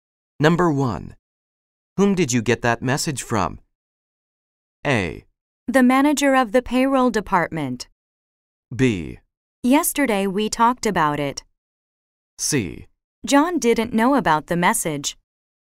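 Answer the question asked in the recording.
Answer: A: The manager of the payroll department.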